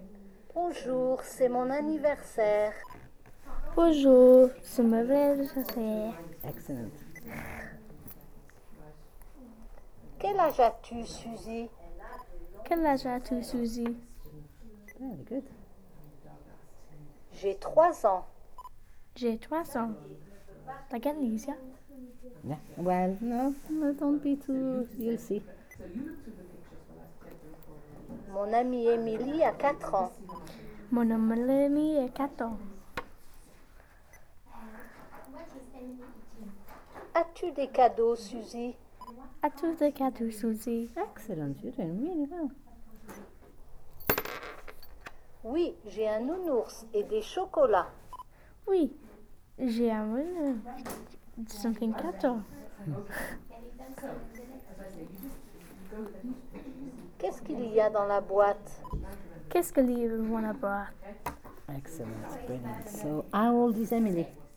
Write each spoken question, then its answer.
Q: So, how old is Emily?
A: It said, mon amie Emily a 4 ans.